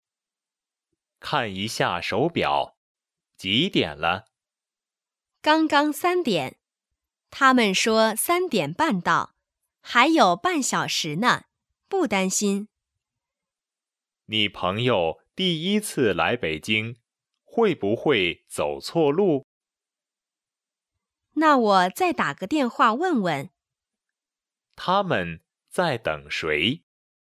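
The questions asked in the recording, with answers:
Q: 他们在等谁?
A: 朋友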